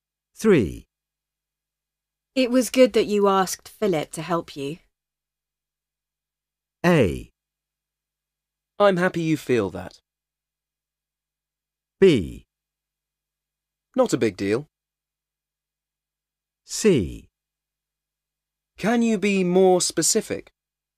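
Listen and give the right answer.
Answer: A: I'm happy you feel that.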